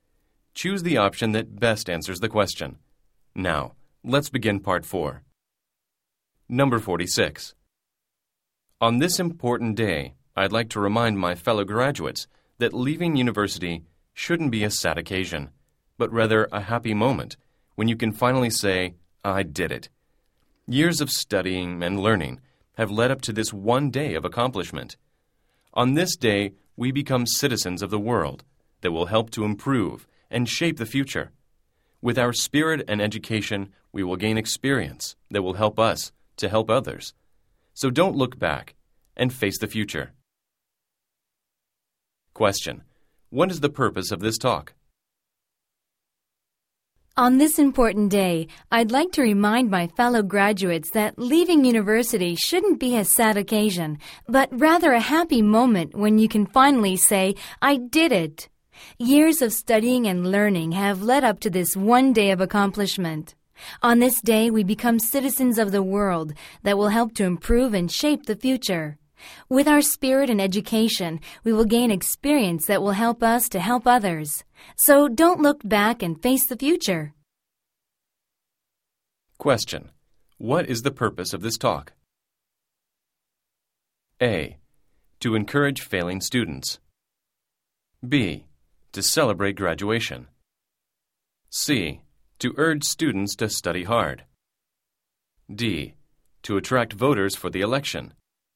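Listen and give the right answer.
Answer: B: To celebrate graduation.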